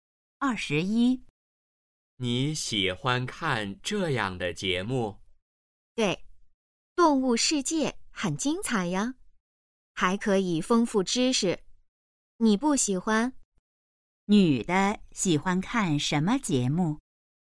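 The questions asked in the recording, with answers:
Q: 女的喜欢看什么节目?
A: 动物世界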